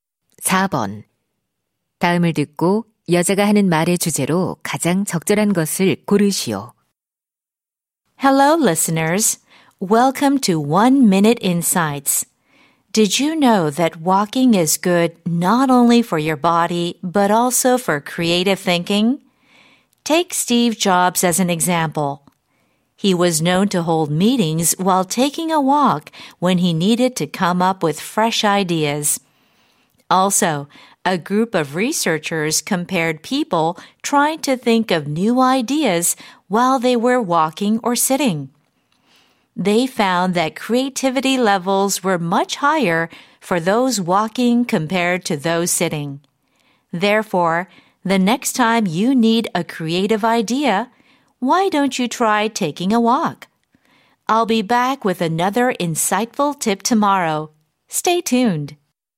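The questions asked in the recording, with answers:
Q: 다음을 듣고 여자가 하는 말의 주제로 가장 적절한 것을 고르시오.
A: 걷기가 창의적 사고에 도움이 된다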